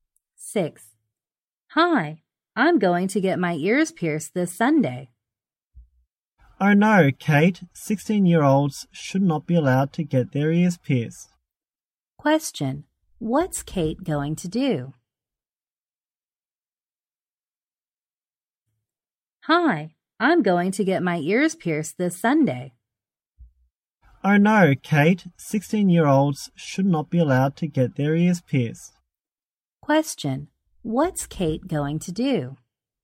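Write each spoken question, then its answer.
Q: Question, what's Kate going to do?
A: Get her ears pierced this Sunday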